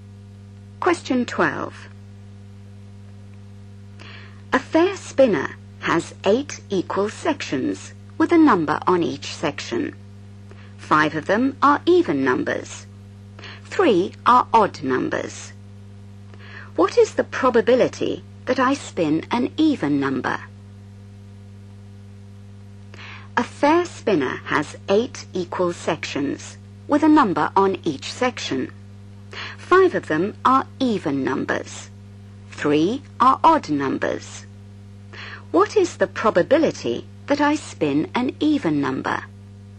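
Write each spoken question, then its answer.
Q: What is the probability that I spin an even number?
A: 5/8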